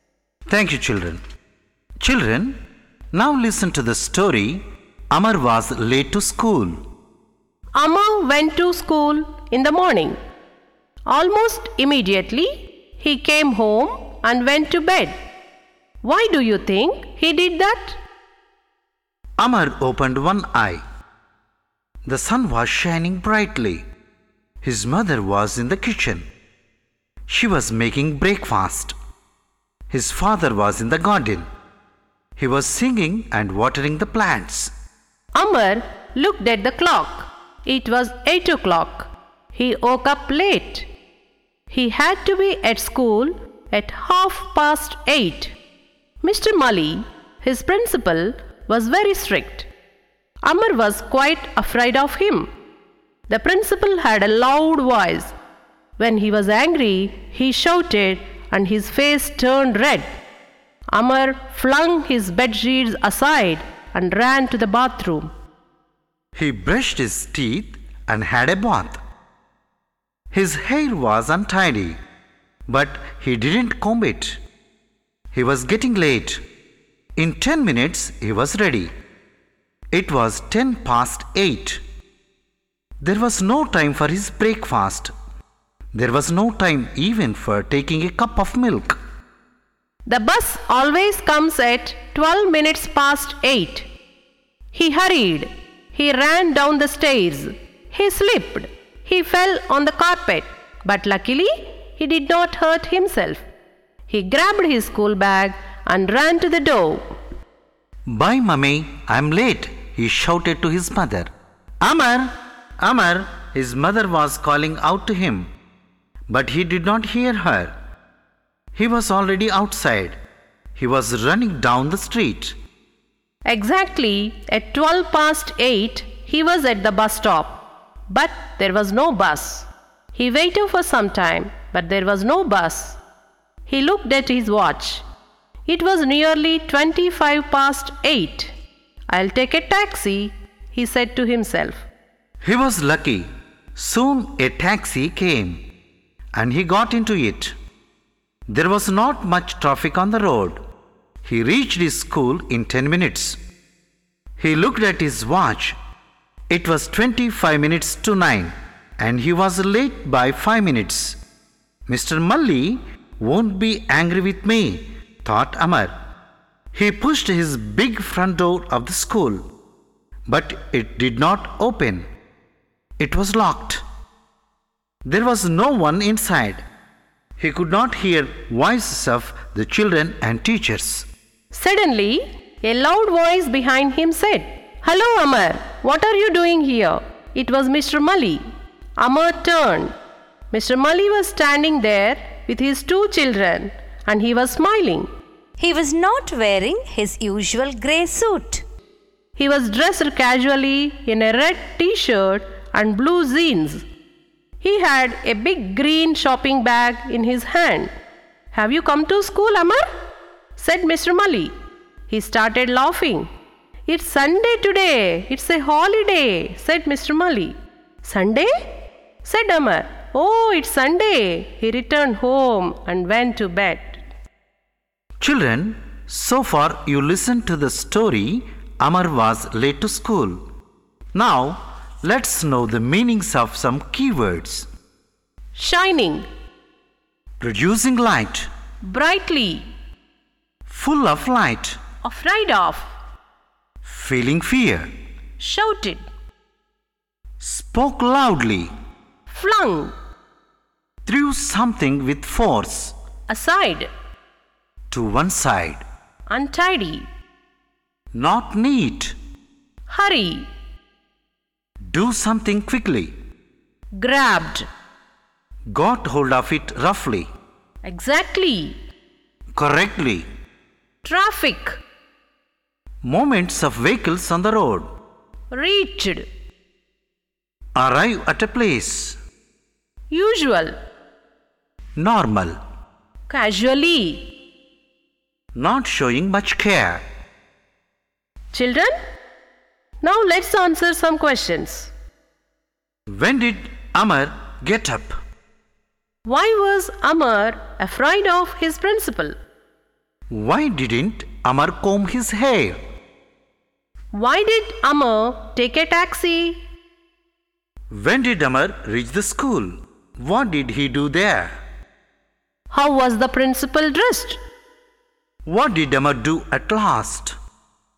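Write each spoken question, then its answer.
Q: When did Amar get up?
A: At 8 o'clock (he woke up late)

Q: Why was Amar afraid of his principal?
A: He was very strict, had a loud voice and shouted when angry

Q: Why didn't Amar comb his hair?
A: He was getting late

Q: Why did Amar take a taxi?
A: The bus did not come

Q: What did he do there?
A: He pushed the front door, but it was locked

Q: How was the principal dressed?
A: Casually, in a red t-shirt and blue jeans

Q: What did Amar do at last?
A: He returned home and went to bed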